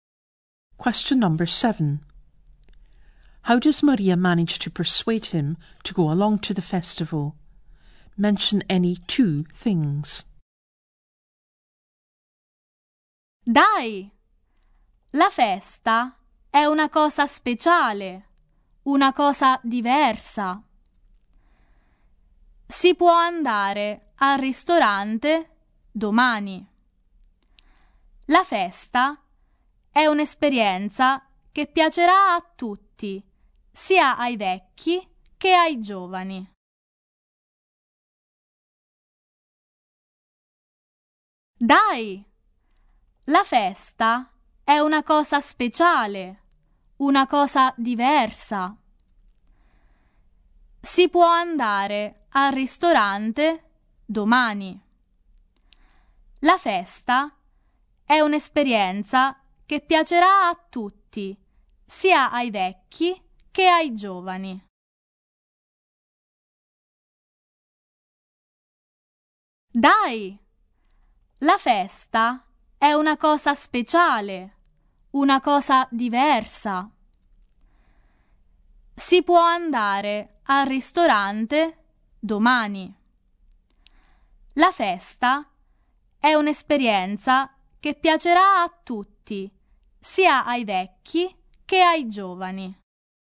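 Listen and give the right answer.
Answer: The festival is special and different; they can go to the restaurant tomorrow; everyone, old and young, will enjoy it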